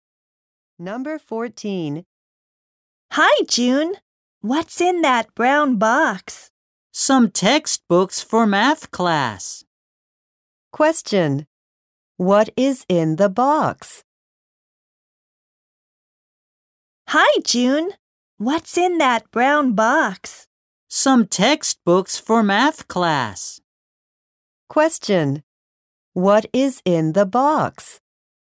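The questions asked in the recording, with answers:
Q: What is in the box?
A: Some textbooks for math class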